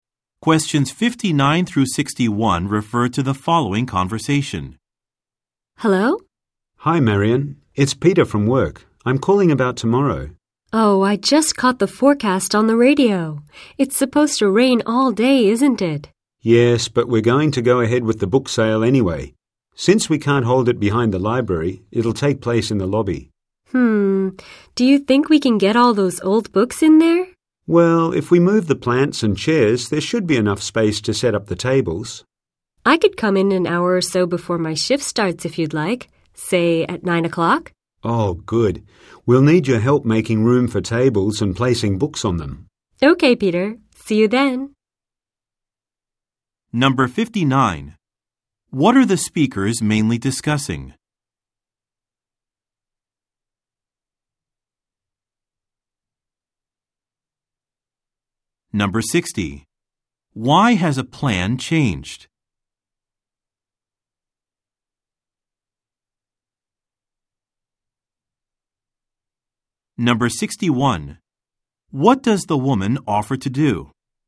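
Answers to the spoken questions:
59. A book sale at the library
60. Rain is forecast, so the sale will be held in the lobby
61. Come in early, at nine o'clock, to help set up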